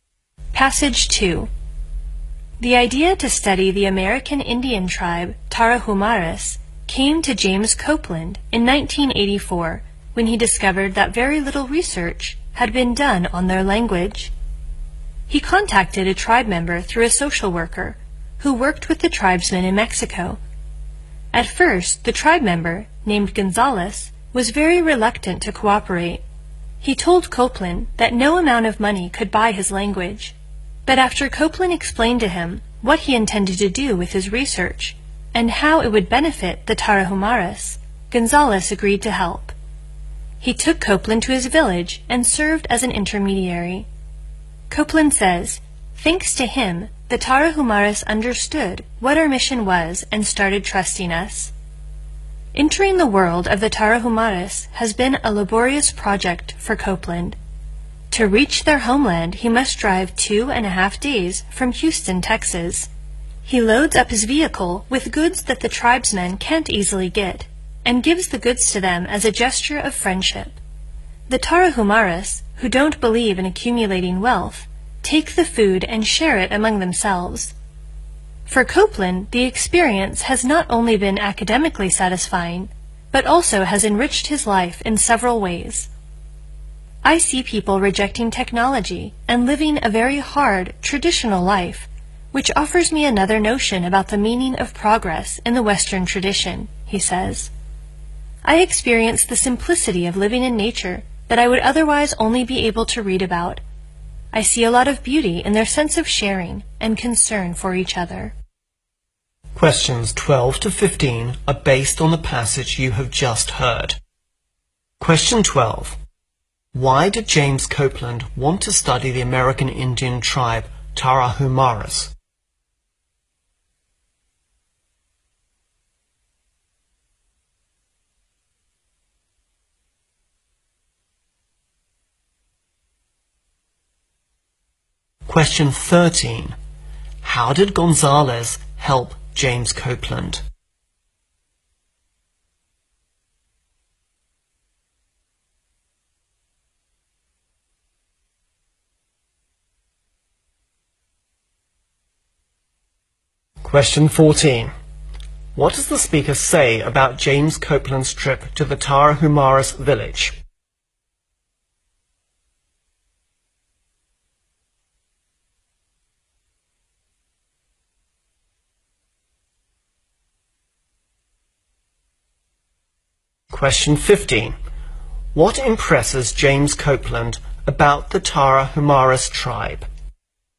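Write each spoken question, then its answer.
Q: Why did James Copeland want to study the American Indian tribe Tarahumaras?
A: Very little research had been done on their language.

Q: How did Gonzalez help James Copeland?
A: He took him to his village and acted as a go-between.

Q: What impresses James Copeland about the Tarahumaras tribe?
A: Their sharing and concern for each other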